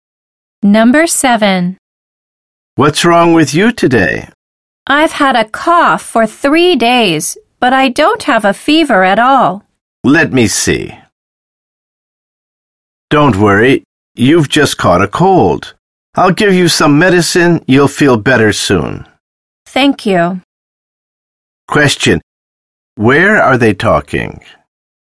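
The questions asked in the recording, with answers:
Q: Where are they talking?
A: At a doctor's office (hospital)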